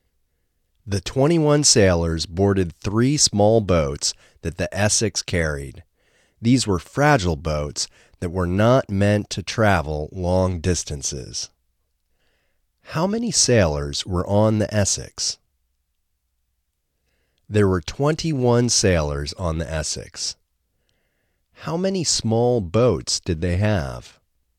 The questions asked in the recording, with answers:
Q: How many small boats did they have?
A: They had 3 small boats.